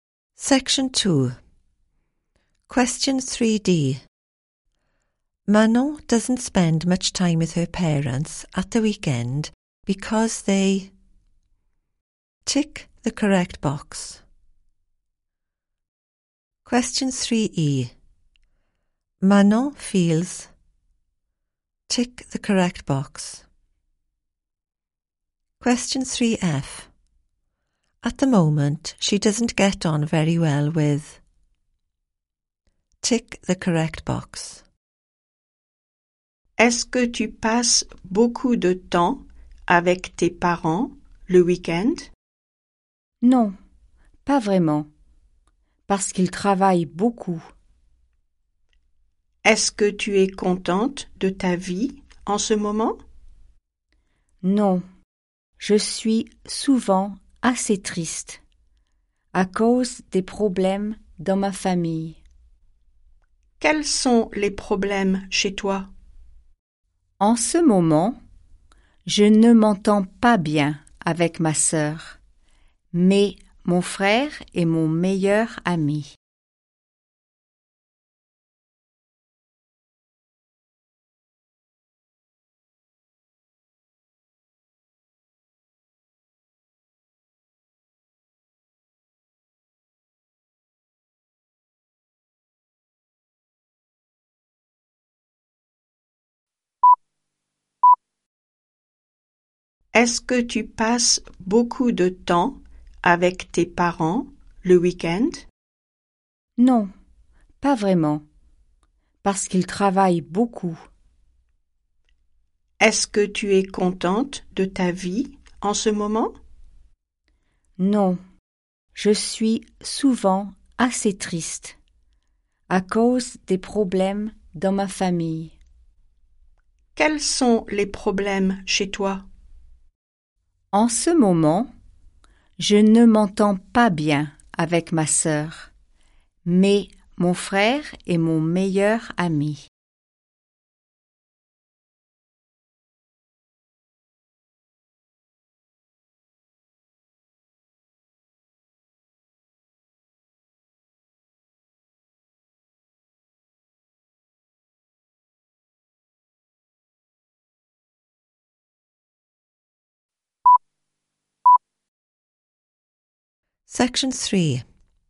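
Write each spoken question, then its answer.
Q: Manon doesn't spend much time with her parents at the weekend because they...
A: work a lot

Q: Manon feels...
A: often quite sad

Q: At the moment, she doesn't get on very well with...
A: her sister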